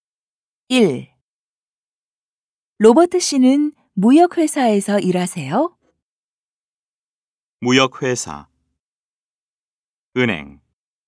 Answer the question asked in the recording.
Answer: 아니요. 무역회사가 아니라 은행에서 일해요.